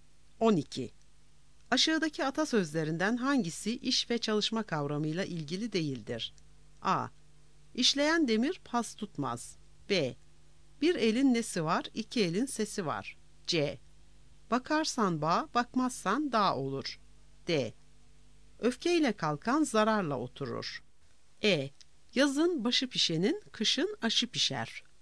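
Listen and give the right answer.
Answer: D: Öfkeyle kalkan zararla oturur.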